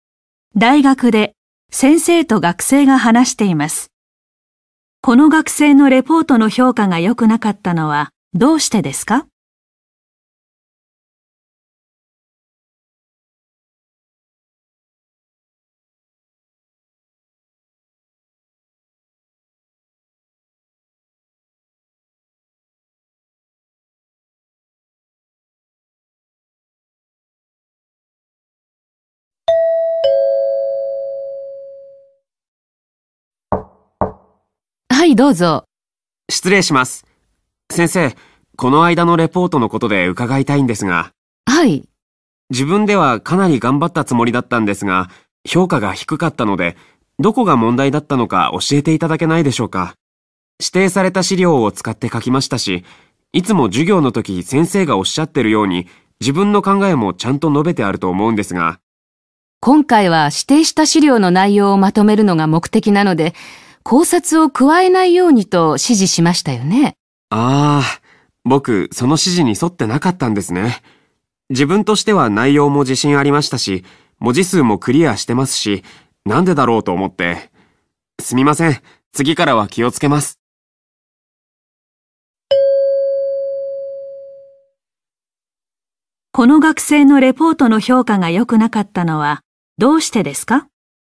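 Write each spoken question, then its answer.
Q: この学生のレポートの評価が良くなかったのはどうしてですか?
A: 考察を加えないようにという指示に従わず、自分の考えを書いたから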